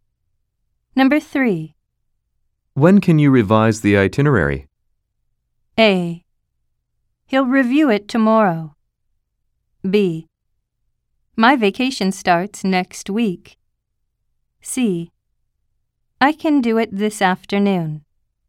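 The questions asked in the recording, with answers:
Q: When can you revise the itinerary?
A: C: I can do it this afternoon.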